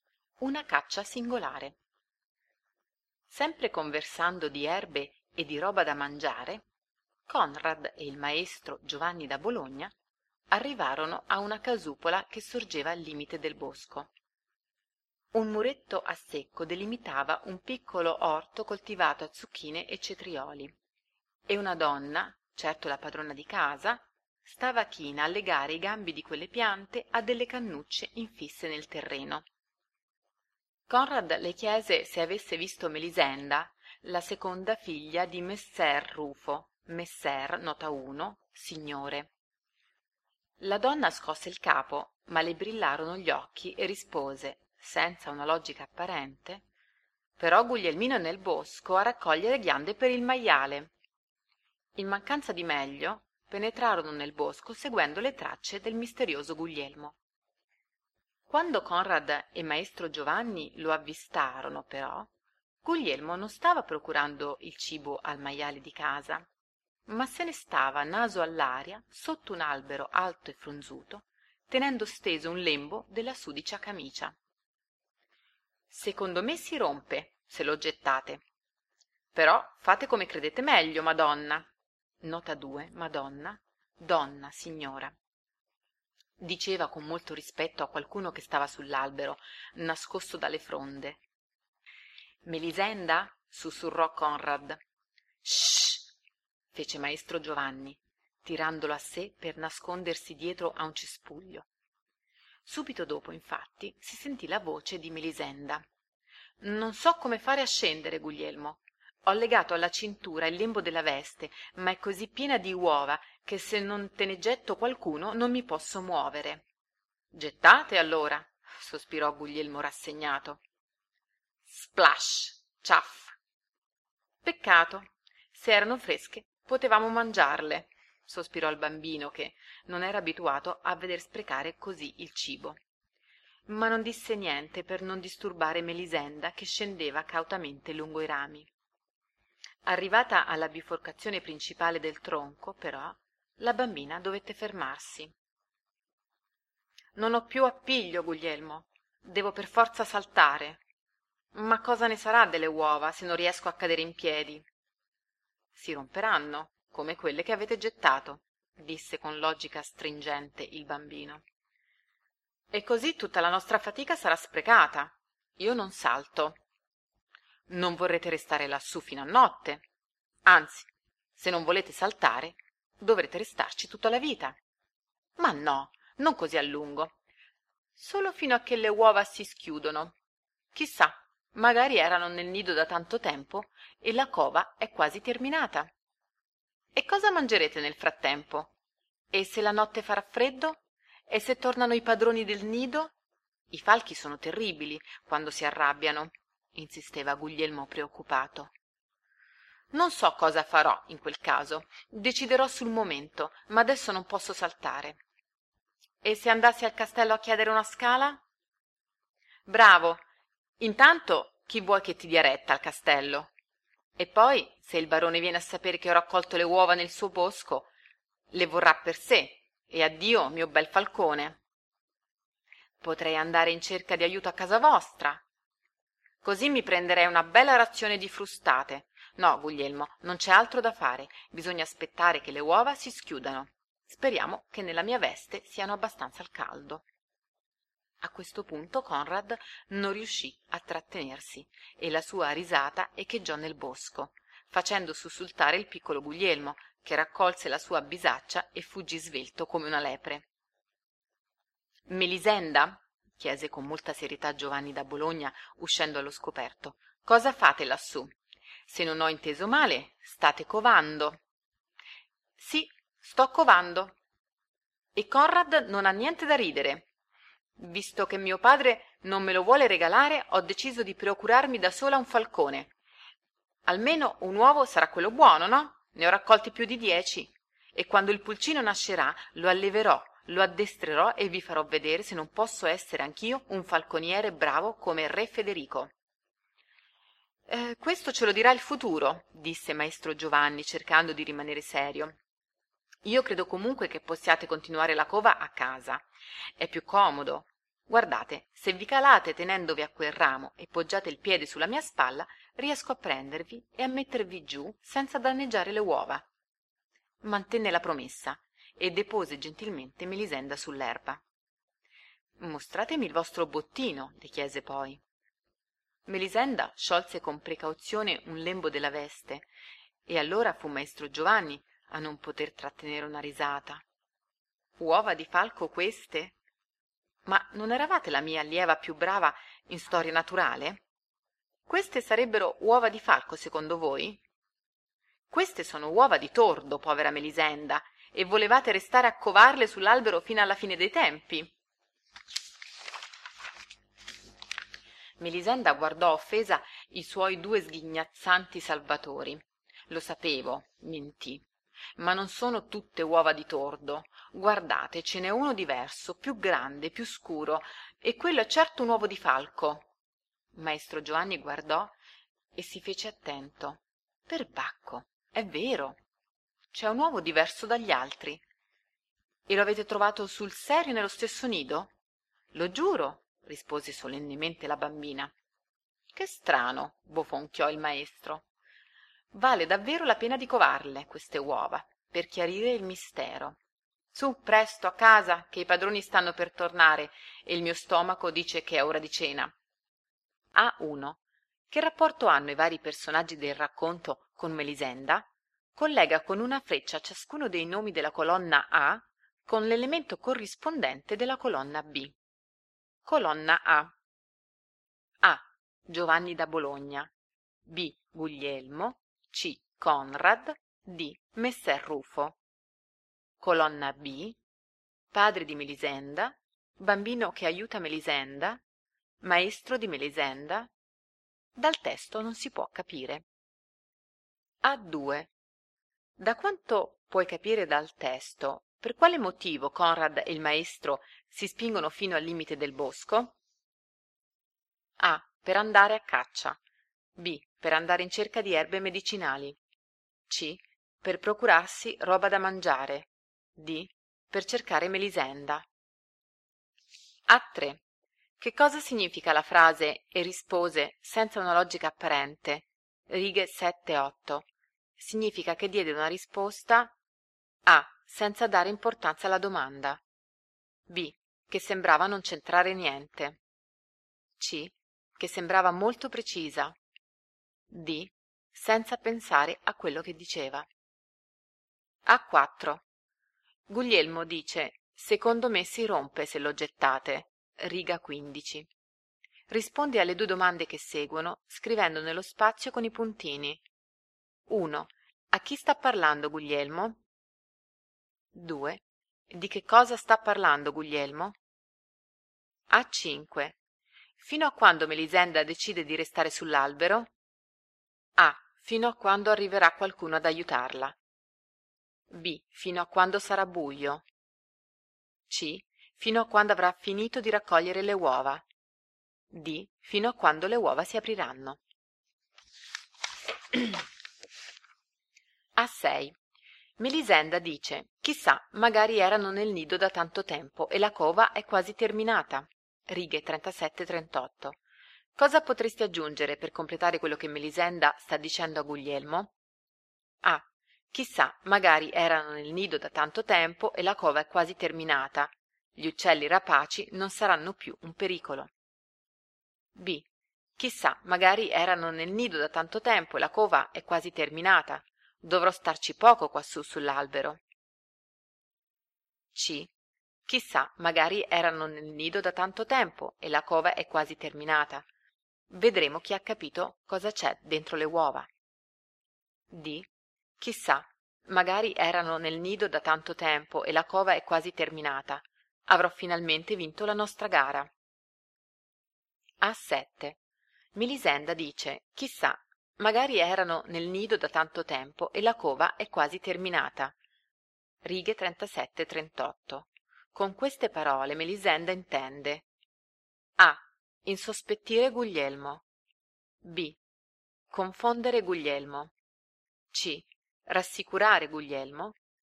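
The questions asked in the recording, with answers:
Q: Da quanto puoi capire dal testo, per quale motivo Conrad e il maestro si spingono fino al limite del bosco?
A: D: Per cercare Melisenda.

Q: Che cosa significa la frase e rispose senza una logica apparente?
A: B: Che sembrava non centrare niente.

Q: Fino a quando Melisenda decide di restare sull'albero?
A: D: Fino a quando le uova si apriranno.

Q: Cosa potresti aggiungere per completare quello che Melisenda sta dicendo a Guglielmo?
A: B: Dovrò starci poco quassù sull'albero.

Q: Con queste parole Melisenda intende: A.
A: C: Rassicurare Guglielmo.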